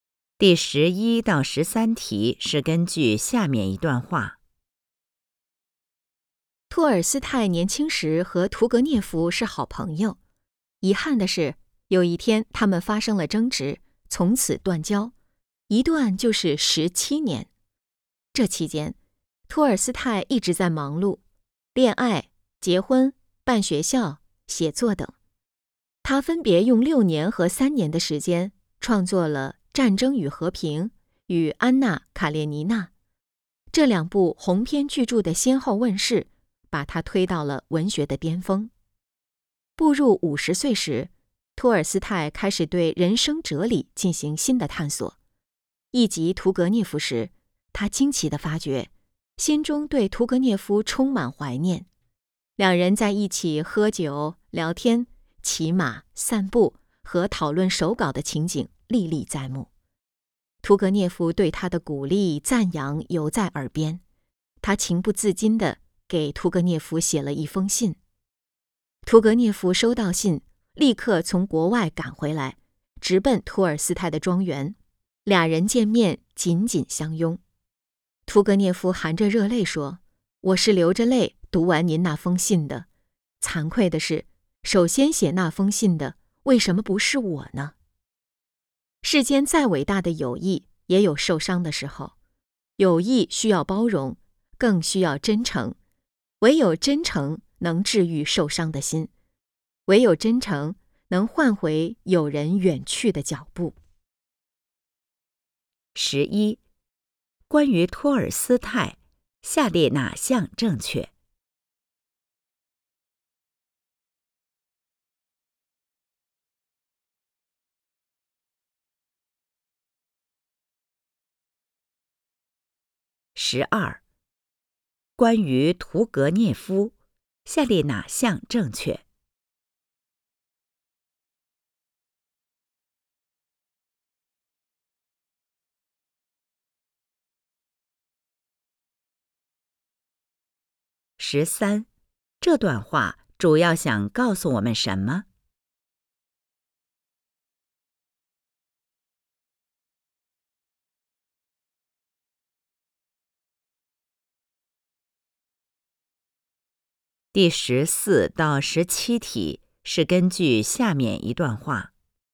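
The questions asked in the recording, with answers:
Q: 十三,这段话主要想告诉我们什 么?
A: 友谊需要包容,更需要真诚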